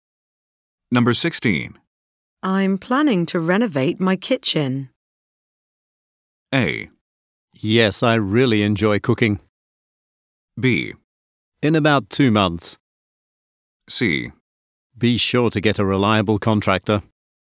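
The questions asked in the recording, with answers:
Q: I'm planning to renovate my kitchen.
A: C: Be sure to get a reliable contractor.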